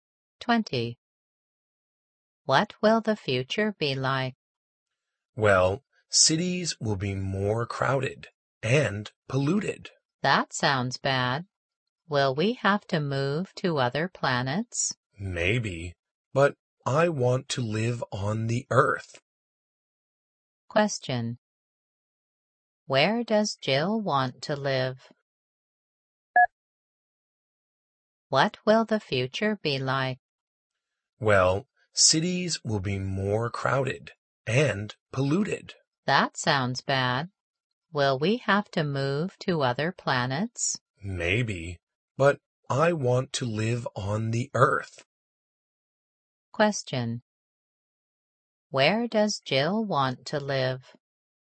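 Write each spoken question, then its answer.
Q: Where does Jill want to live?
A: On the Earth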